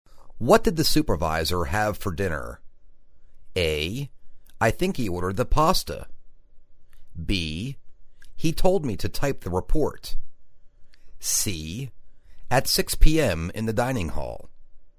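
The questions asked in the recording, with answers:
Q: What did the supervisor have for dinner?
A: A: I think he ordered the pasta.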